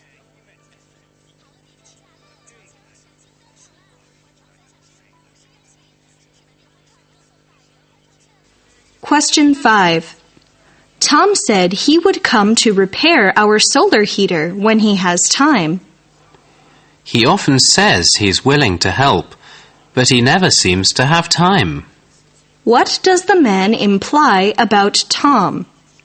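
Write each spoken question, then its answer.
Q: What does the man imply about Tom?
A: Tom says he will help but never actually finds time to do it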